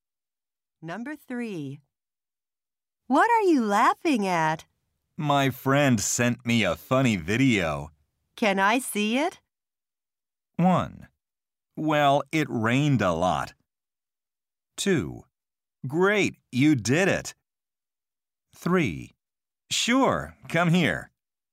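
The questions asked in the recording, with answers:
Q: Can I see it?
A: 3: Sure, come here.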